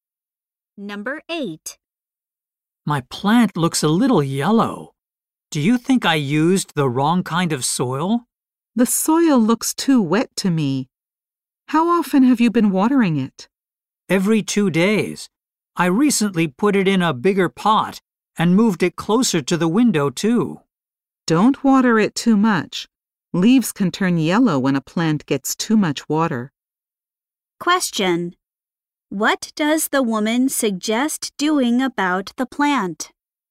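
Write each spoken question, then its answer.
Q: What does the woman suggest doing about the plant?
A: Watering it less.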